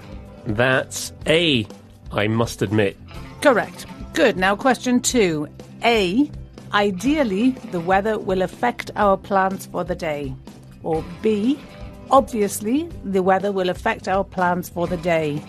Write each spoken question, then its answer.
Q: Now, question two, A, ideally the weather will affect our plans for the day, or B, obviously the weather will affect our plans for the day.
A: And that one is B, obviously.